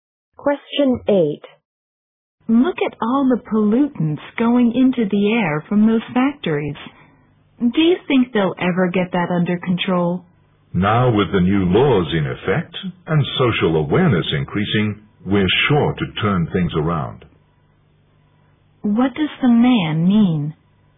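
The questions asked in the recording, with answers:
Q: What does the man mean?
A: Air pollution will eventually be brought under control.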